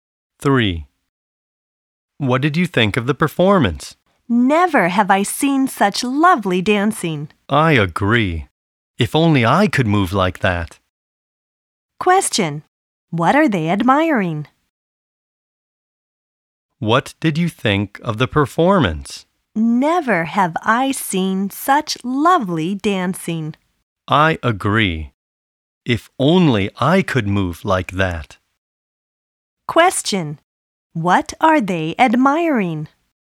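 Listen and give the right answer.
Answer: The dancing (in the performance).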